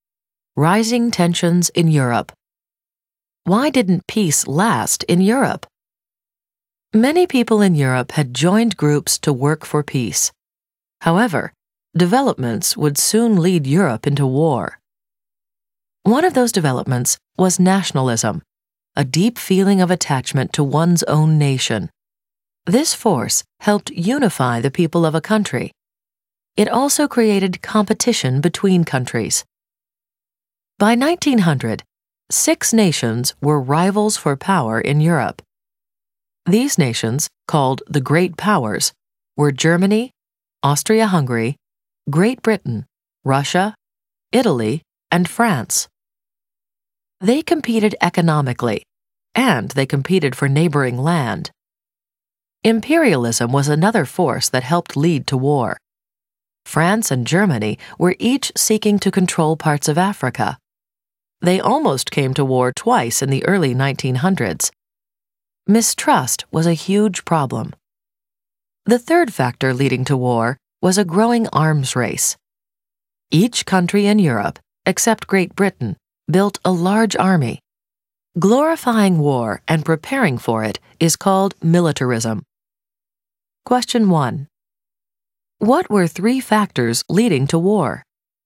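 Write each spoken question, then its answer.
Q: What were three factors leading to war?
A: Nationalism, imperialism, and militarism (the arms race)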